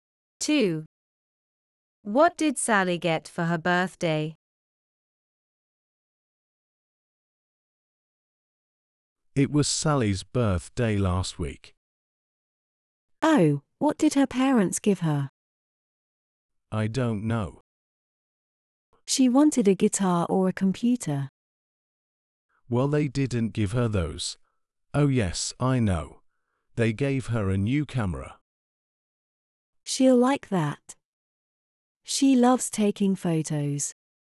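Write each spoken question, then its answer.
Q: What did Sally get for her birthday?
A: a new camera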